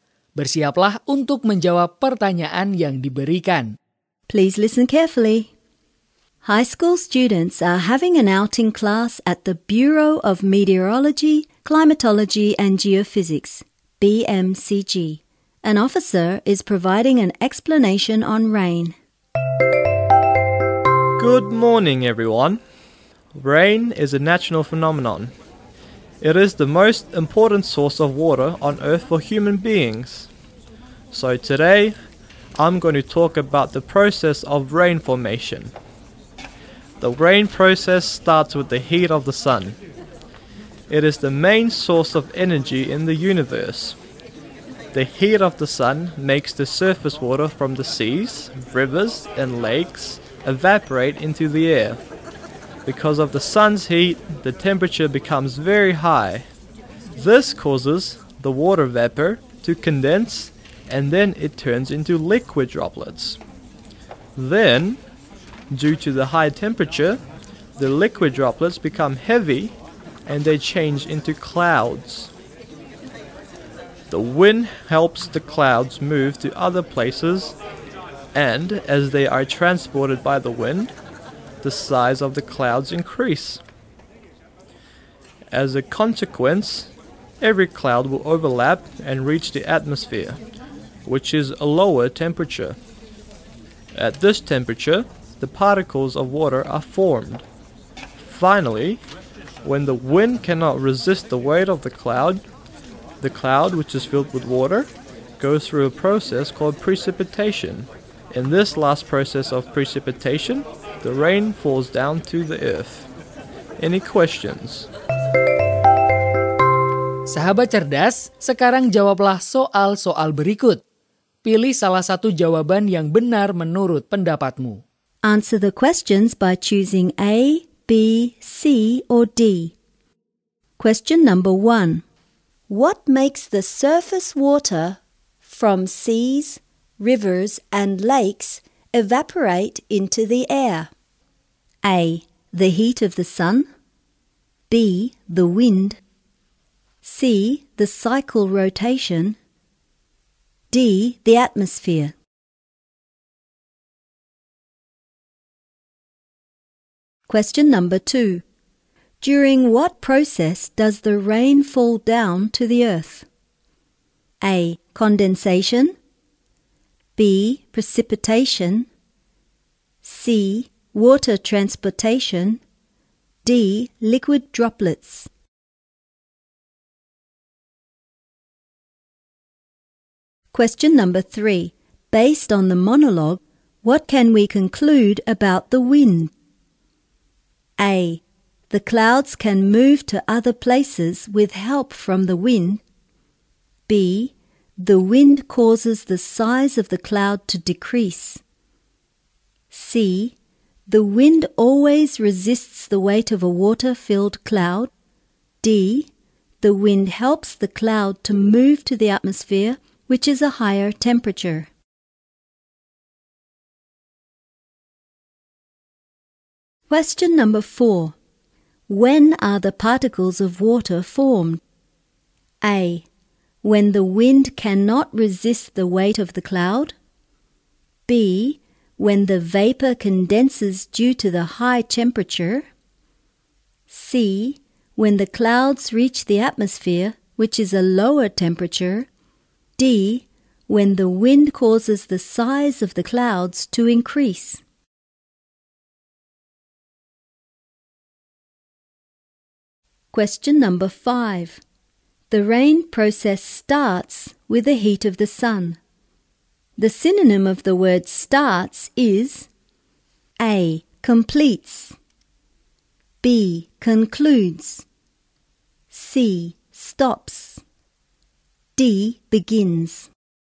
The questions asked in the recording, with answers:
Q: What makes the surface water from seas, rivers, and lakes evaporate into the air?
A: A. The heat of the sun.

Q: During what process does the rain fall down to the earth?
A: B. Precipitation.

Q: Based on the monologue, what can we conclude about the wind?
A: A. The clouds can move to other places with help from the wind.

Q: When are the particles of water formed?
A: C. When the clouds reach the atmosphere, which is a lower temperature.

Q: The rain process starts with the heat of the sun. The synonym of the word starts is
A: D. Begins.